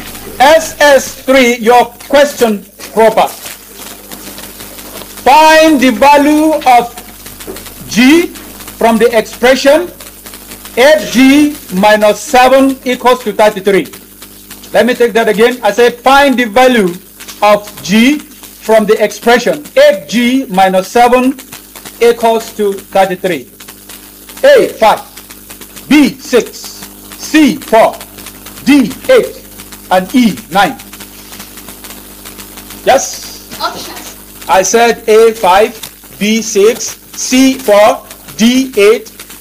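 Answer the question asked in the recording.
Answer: A: 5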